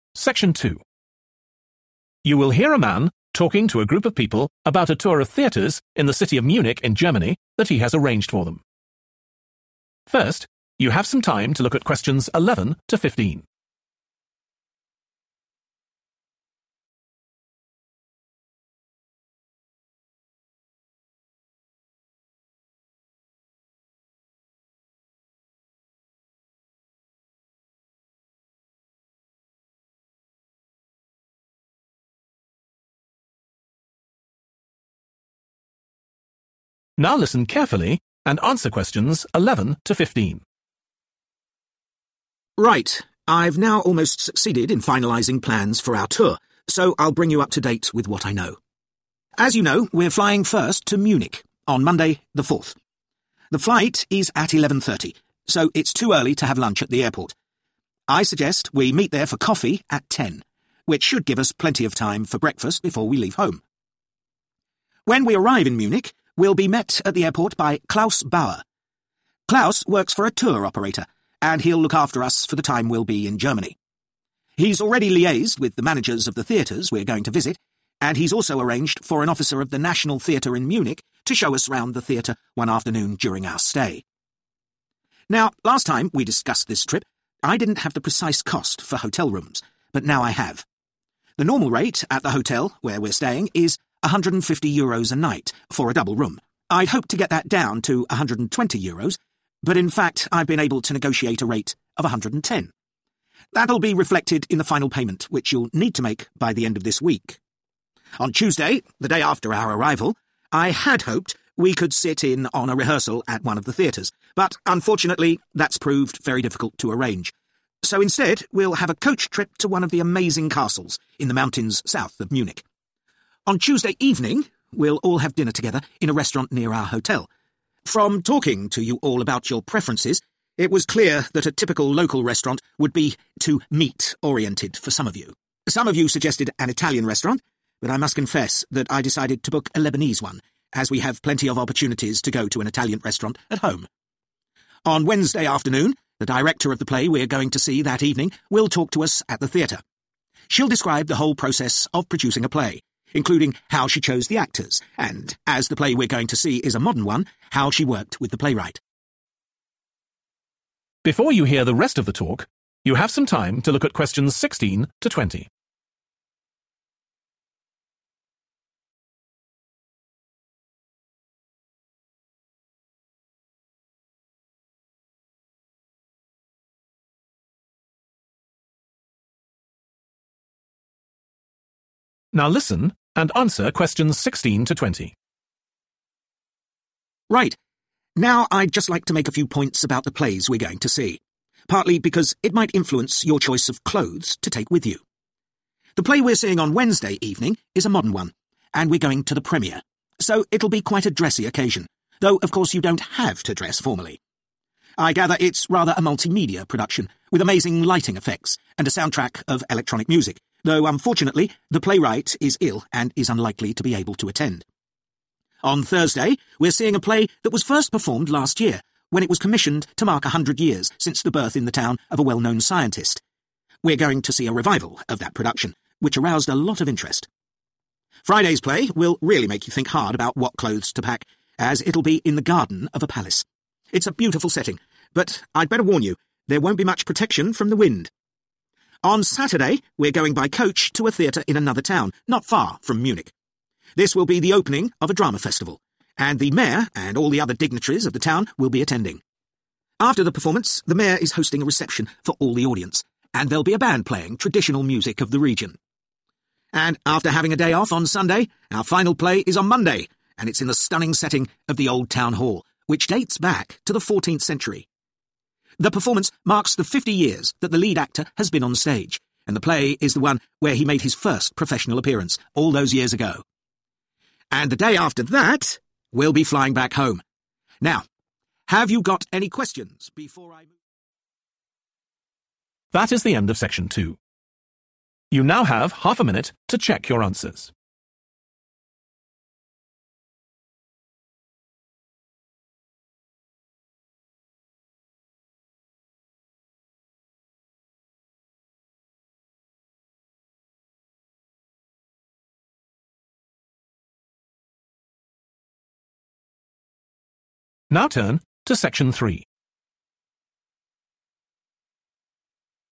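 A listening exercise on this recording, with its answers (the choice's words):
Choose the correct letter, A, B or C.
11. When the group meet at the airport they will have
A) breakfast.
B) coffee.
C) lunch.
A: coffee.

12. The group will be met at Munich Airport by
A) an employee at the National Theatre.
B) a theatre manager.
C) a tour operator.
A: a tour operator.

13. How much will they pay per night for a double room at the hotel?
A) 110 euros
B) 120 euros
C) 150 euros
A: 110 euros

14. What type of restaurant will they go to on Tuesday evening?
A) an Italian restaurant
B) a Lebanese restaurant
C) a typical restaurant of the region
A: a Lebanese restaurant

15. Who will they meet on Wednesday afternoon?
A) an actor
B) a playwright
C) a theatre director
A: a theatre director

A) The playwright will be present.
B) The play was written to celebrate an anniversary.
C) The play will be performed inside a historic building.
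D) The play will be accompanied by live music.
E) The play will be performed outdoors.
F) The play will be performed for the first time.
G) The performance will be attended by officials from the town.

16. Wednesday ..............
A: The play will be performed for the first time.

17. Thursday ..............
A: The play was written to celebrate an anniversary.

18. Friday ..............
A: The play will be performed outdoors.

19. Saturday ..............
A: The performance will be attended by officials from the town.

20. Monday ..............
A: The play will be performed inside a historic building.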